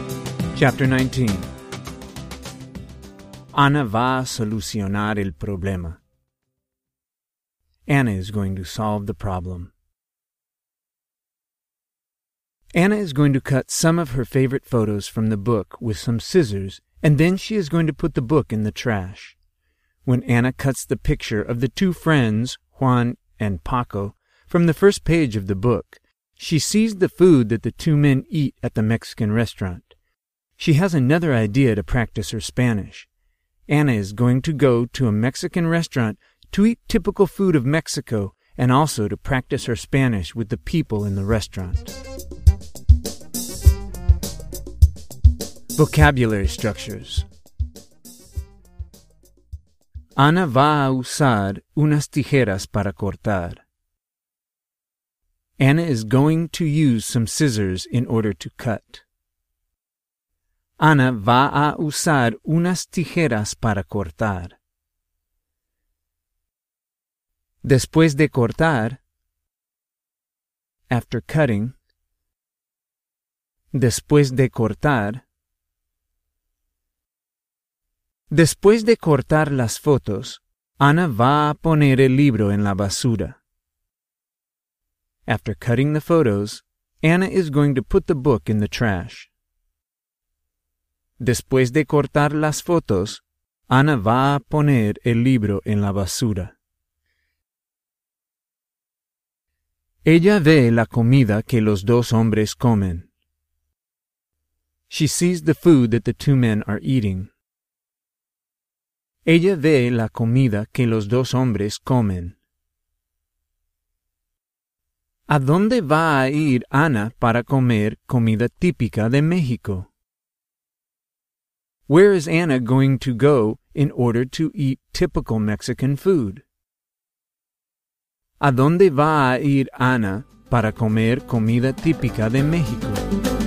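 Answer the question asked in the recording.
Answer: A un restaurante mexicano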